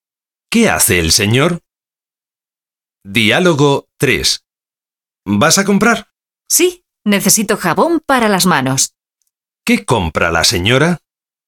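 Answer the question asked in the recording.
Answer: Jabón para las manos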